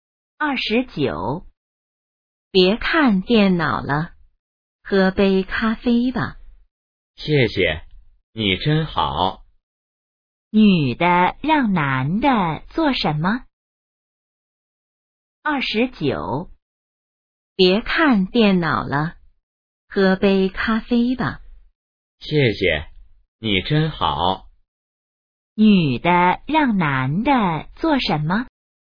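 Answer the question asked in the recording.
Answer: 喝杯咖啡(别看电脑了)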